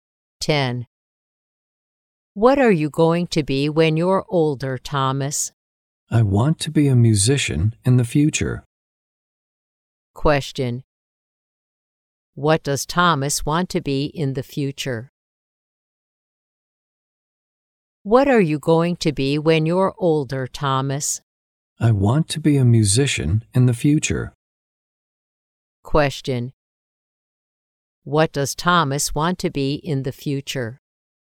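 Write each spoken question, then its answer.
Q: What does Thomas want to be in the future?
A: A musician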